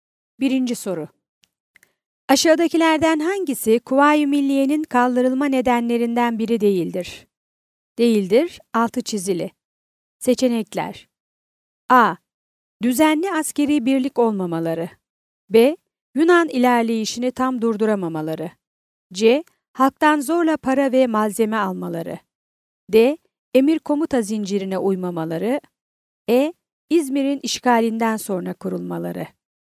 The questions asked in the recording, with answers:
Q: Aşağıdakilerden hangisi Kuvayi Milliye'nin kaldırılma nedenlerinden biri değildir?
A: Yanıt: Edirne.